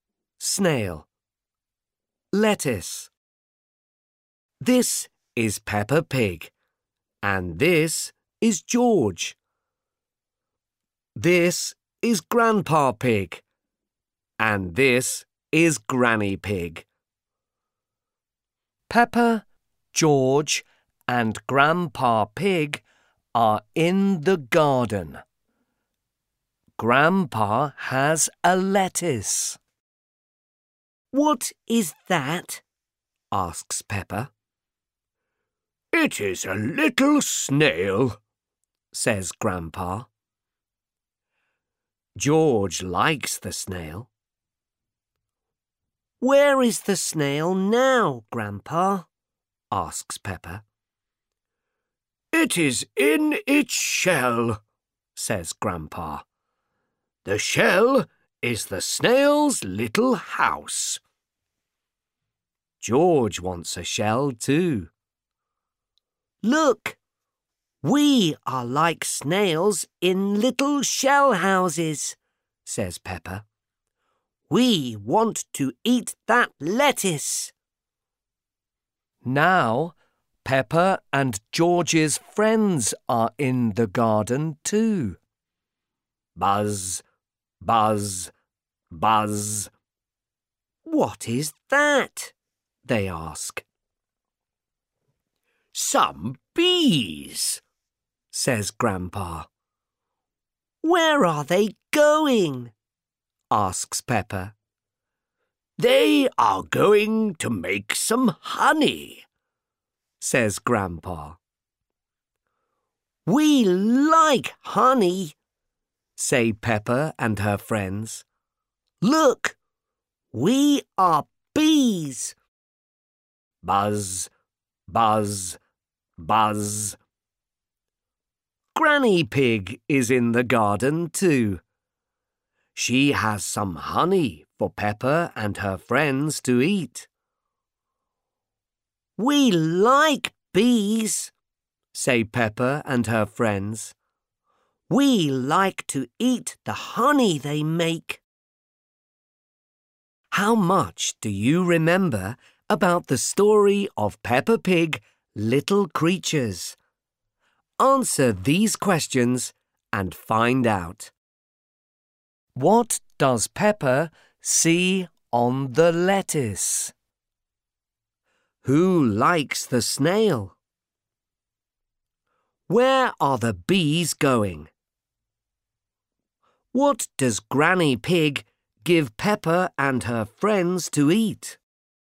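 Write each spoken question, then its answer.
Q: What does Peppa see on the lettuce?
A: A little snail

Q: Who likes the snail?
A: George

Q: Where are the bees going?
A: To make some honey

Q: What does Granny Pig give Peppa and her friends to eat?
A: Honey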